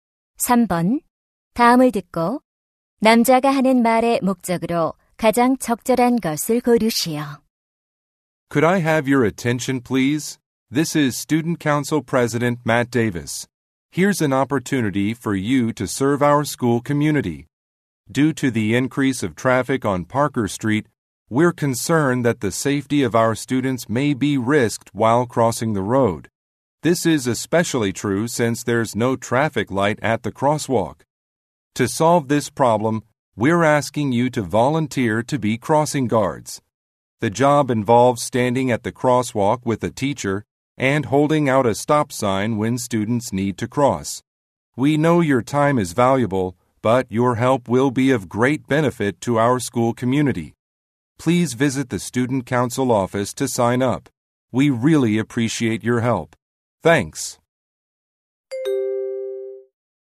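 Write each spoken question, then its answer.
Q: 다음을 듣고 남자가 하는 말의 목적으로 가장 적절한 것을 고르시오.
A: 교통안전 지도 자원봉사자를 모집하려고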